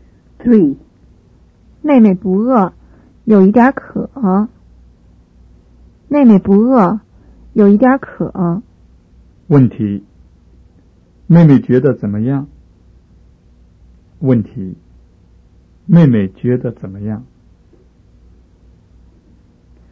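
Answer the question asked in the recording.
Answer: 不饿,有一点渴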